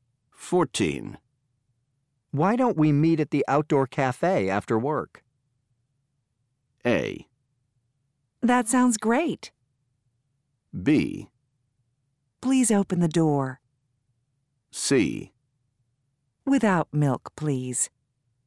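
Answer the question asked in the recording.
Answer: A: That sounds great.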